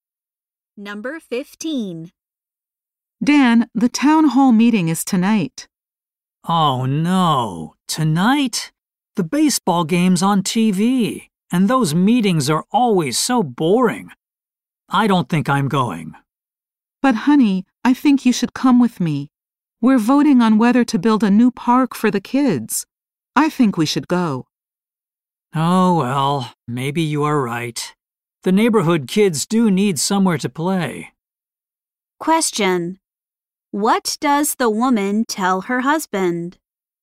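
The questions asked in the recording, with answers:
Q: What does the woman tell her husband?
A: They should go to the town hall meeting to vote on a new park.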